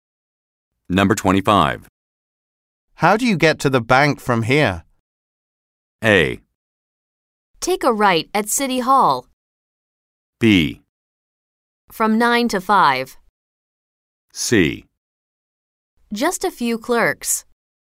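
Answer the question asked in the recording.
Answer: A: Take a right at City Hall.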